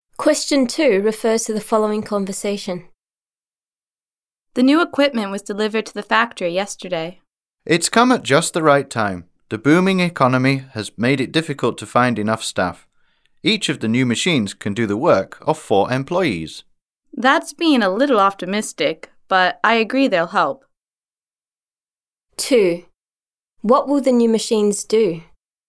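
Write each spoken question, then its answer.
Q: What will the new machines do?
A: Do work that employees would otherwise do, helping with the staff shortage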